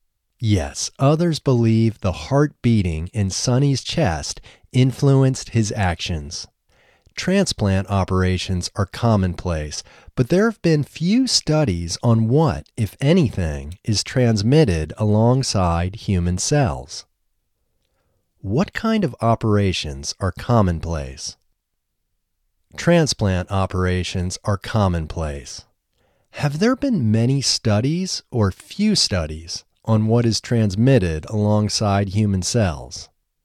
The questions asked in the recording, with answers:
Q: What kind of operations are commonplace?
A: Transplant operations are commonplace.

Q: Have there been many studies or few studies on what is transmitted alongside human cells?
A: There have been few studies on what is transmitted alongside human cells.